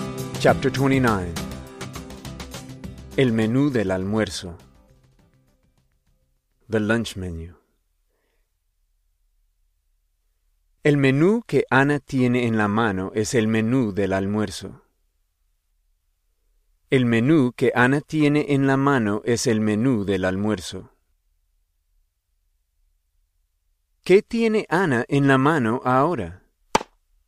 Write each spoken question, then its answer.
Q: ¿Qué tiene Ana en la mano ahora?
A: Ana tiene el menú del almuerzo en la mano ahora.